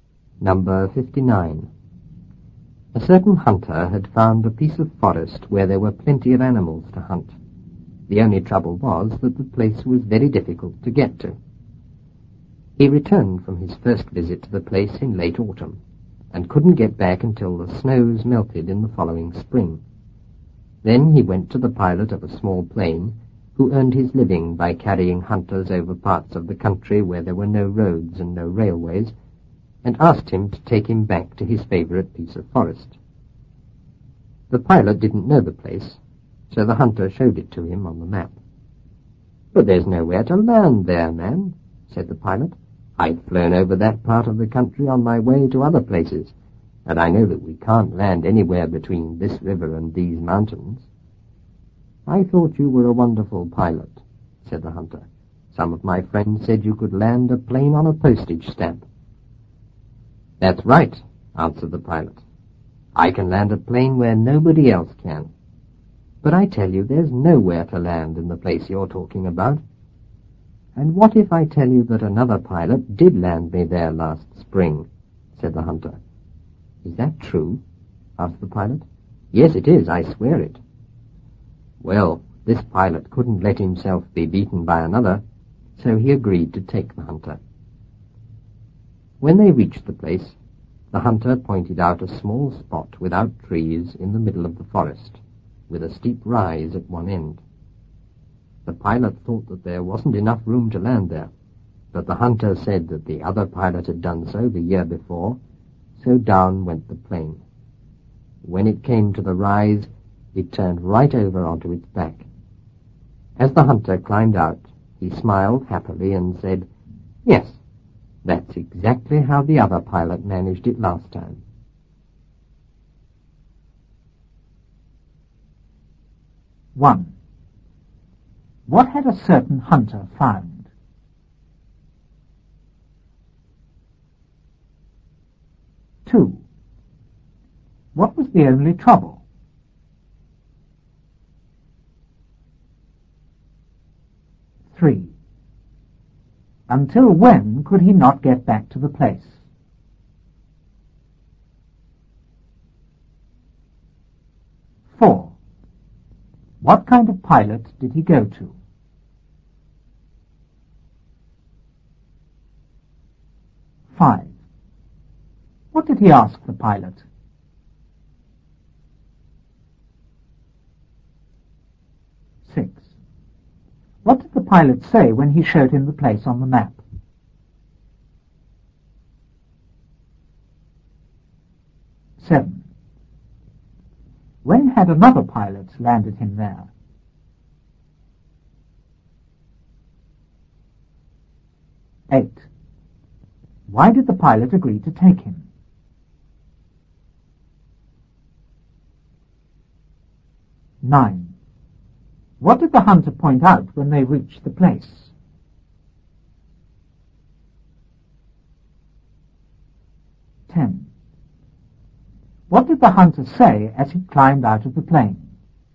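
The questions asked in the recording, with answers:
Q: What had a certain hunter found?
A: A piece of forest with plenty of animals to hunt

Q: What was the only trouble?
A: The place was very difficult to get to

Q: Until when could he not get back to the place?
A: Until the snows melted the following spring

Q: What kind of pilot did he go to?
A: The pilot of a small plane who carried hunters over country with no roads or railways

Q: What did he ask the pilot?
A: To take him back to his favourite piece of forest

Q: What did the pilot say when he showed him the place on the map?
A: That there was nowhere to land there

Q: When had another pilot landed him there?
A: Last spring

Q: Why did the pilot agree to take him?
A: He couldn't let himself be beaten by another pilot

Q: What did the hunter point out when they reached the place?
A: A small spot without trees in the middle of the forest, with a steep rise at one end

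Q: What did the hunter say as he climbed out of the plane?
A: That's exactly how the other pilot managed it last time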